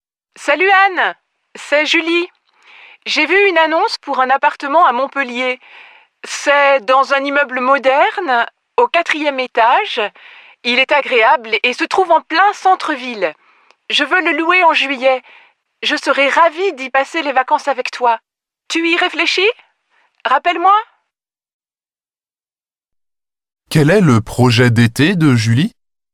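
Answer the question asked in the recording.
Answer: Louer un appartement à Montpellier en juillet pour y passer les vacances avec Anne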